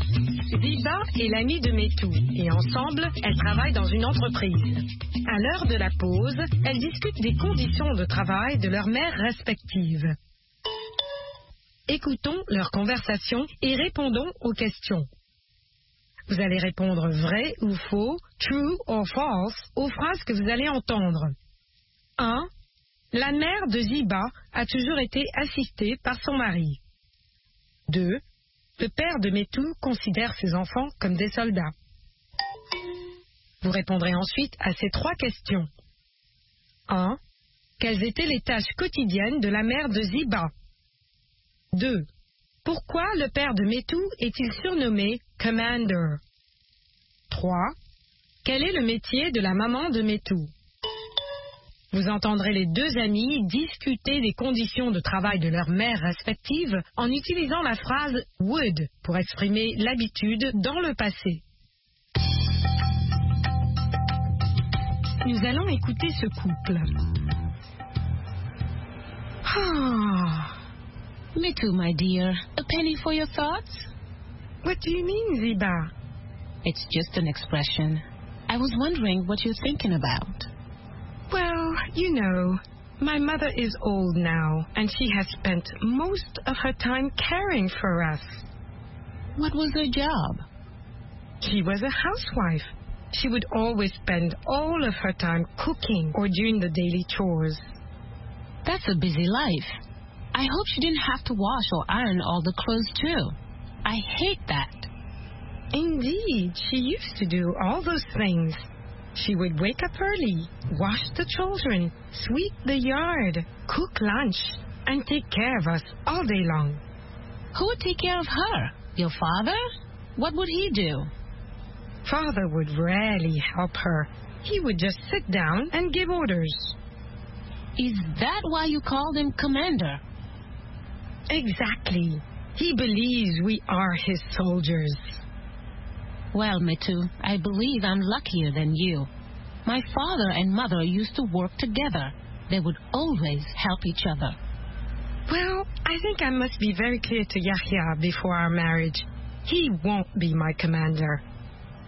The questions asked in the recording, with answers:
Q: La mère de Ziba a toujours été assistée par son mari.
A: L'énoncé 1 est vrai. La mère de Ziba a toujours été assistée par son mari.

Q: Pourquoi le père de Métou est-il surnommé « Commander »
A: Parce qu'il ne faisait que donner des ordres.

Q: Quel est le métier de la maman de Métou?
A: Elle est femme au foyer.